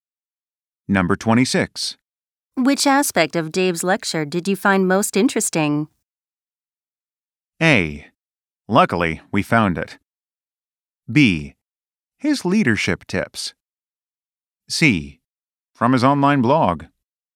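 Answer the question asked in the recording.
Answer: B: His leadership tips.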